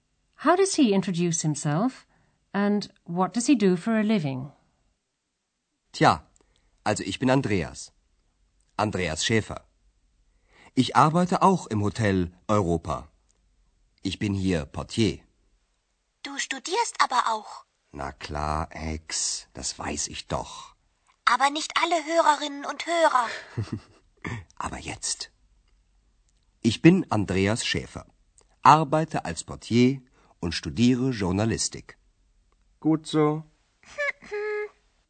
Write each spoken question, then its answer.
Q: How does he introduce himself, and what does he do for a living?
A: He's the porter.